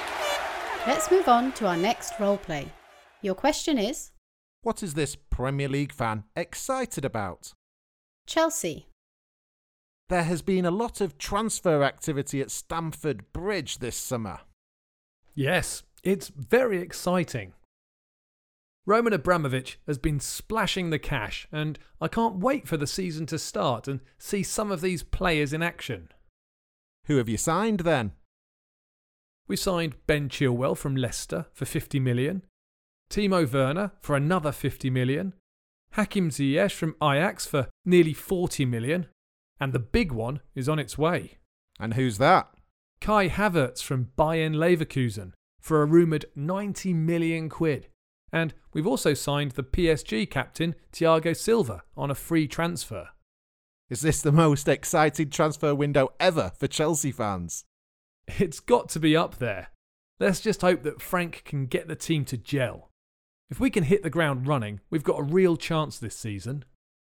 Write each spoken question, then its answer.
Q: What is this Premier League fan excited about?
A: Well, he's excited about all the new signings that Chelsea have made.